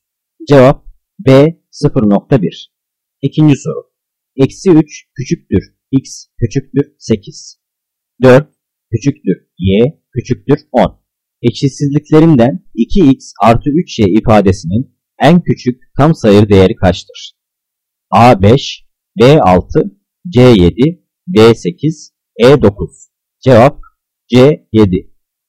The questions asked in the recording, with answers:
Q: Eşitsizliklerinden 2x artı 3y ifadesinin en küçük tam sayı değeri kaçtır?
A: Cevap C7.